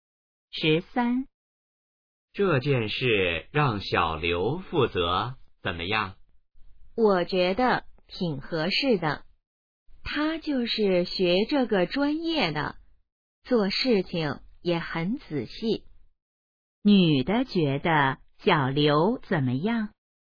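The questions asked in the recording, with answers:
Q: 女的觉得小刘怎么样?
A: 挺合适的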